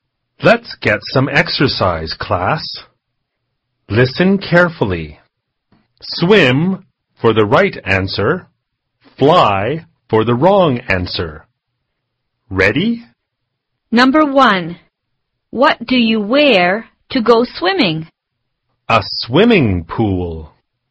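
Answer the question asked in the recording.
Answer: Wrong answer (fly): you don't wear a swimming pool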